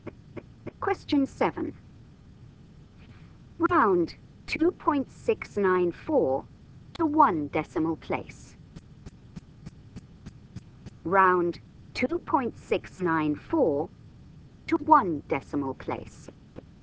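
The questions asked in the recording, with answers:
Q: Round 2.694 to one decimal place.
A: 2.7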